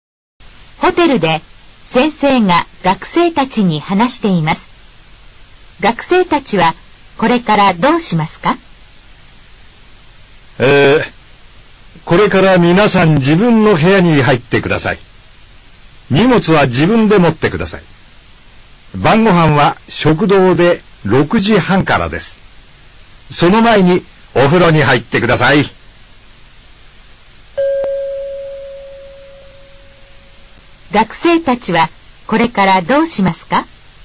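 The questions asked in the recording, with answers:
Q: 学生たちはこれからどうしますか?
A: 自分の荷物を持って自分の部屋に入る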